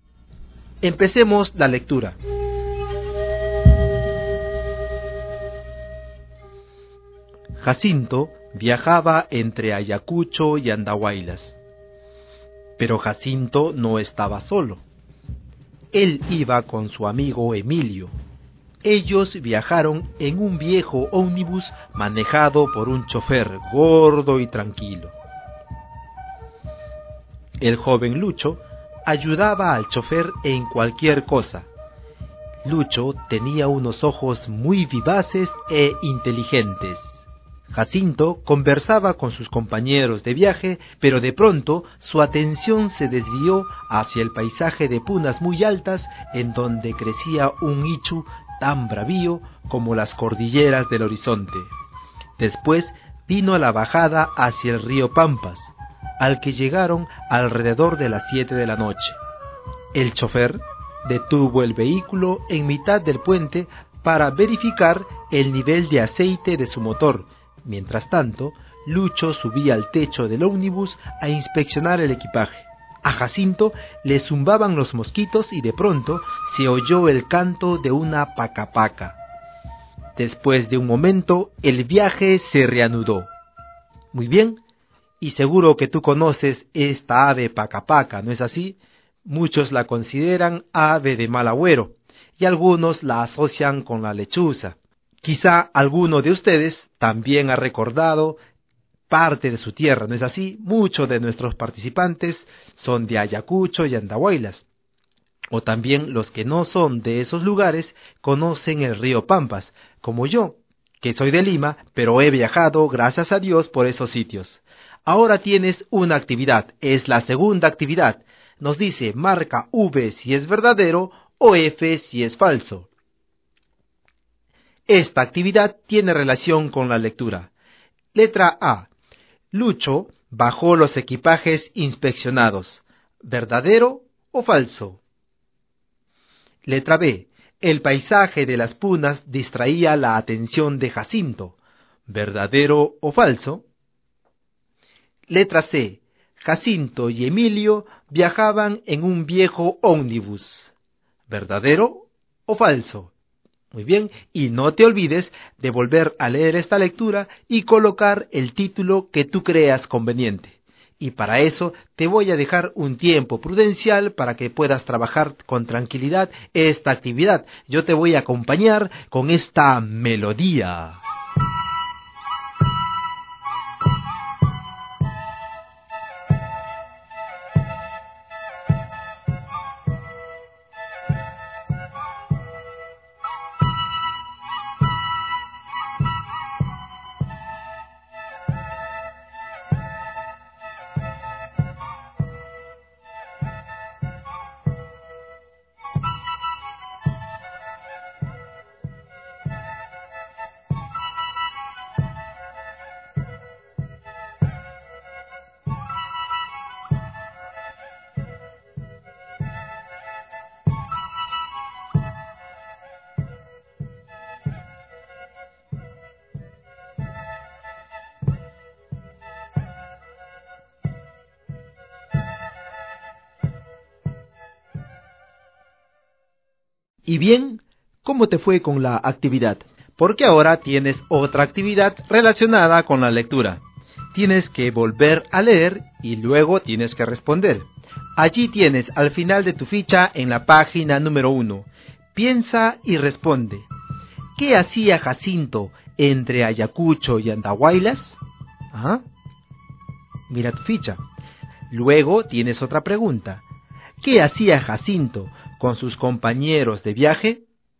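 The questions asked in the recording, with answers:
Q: Lucho bajó los equipajes inspeccionados.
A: Falso

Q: El paisaje de las punas distraía la atención de Jacinto.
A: Verdadero

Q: Jacinto y Emilio viajaban en un viejo ómnibus.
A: Verdadero

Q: ¿Qué hacía Jacinto entre Ayacucho y Andahuaylas?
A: Pues viajaba, ¿no es cierto?

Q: ¿Qué hacía Jacinto con sus compañeros de viaje?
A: Conversaba.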